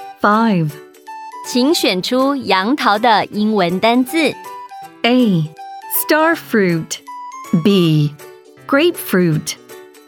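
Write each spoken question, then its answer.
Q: 请选出杨桃的英文单字。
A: A: Star fruit.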